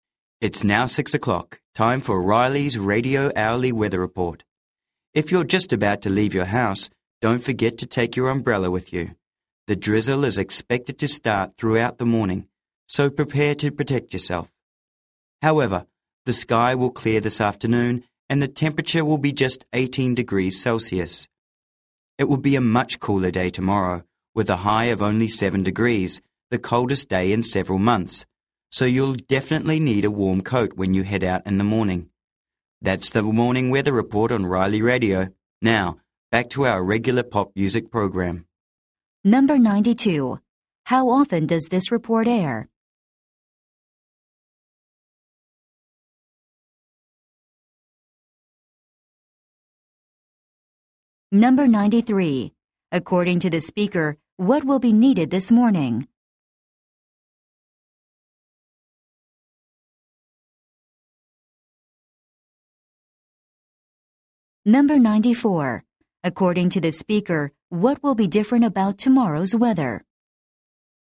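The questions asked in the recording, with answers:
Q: How often does this report air?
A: Every hour

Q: According to the speaker, what will be needed this morning?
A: An umbrella

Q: According to the speaker, what will be different about tomorrow's weather?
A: It will be much cooler, the coldest day in months (high of 7 degrees)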